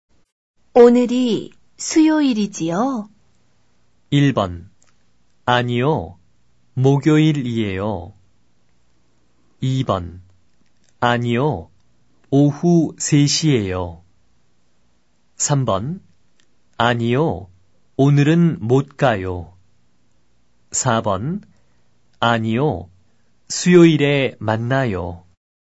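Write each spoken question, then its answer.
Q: 오늘이 수요일이지요?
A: 1: 아니요. 목요일이에요.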